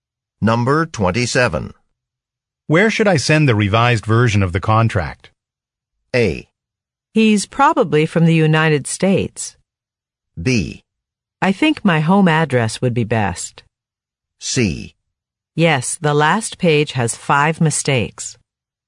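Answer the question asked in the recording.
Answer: B: I think my home address would be best.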